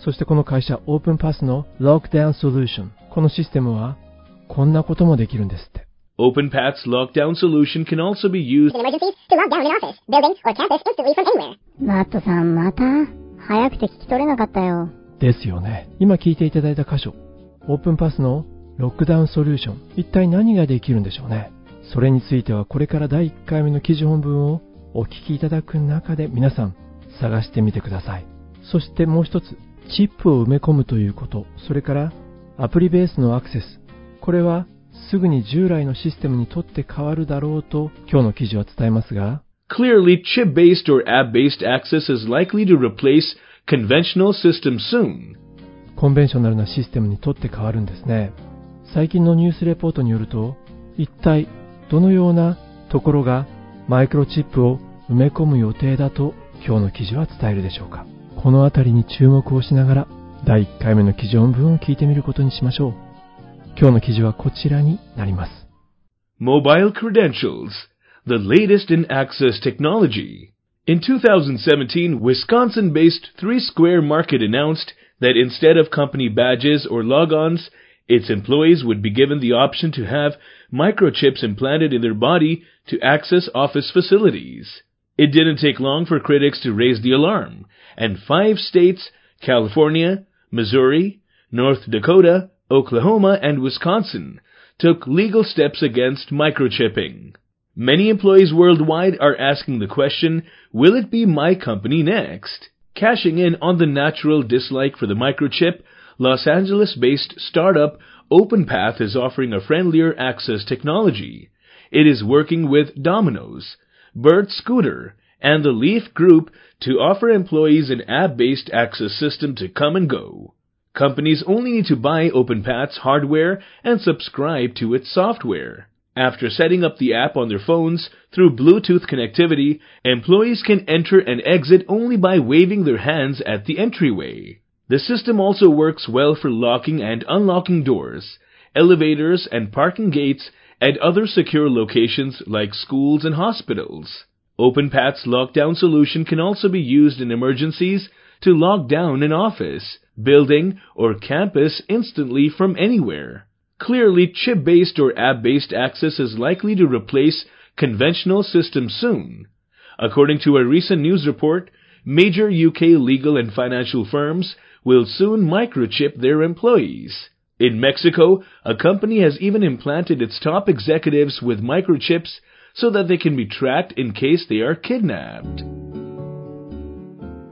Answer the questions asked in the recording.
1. OpenPath's lockdown solution can also be used in emergencies to lock down an office, building, or campus instantly from anywhere.
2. Major UK legal and financial firms will soon microchip their employees.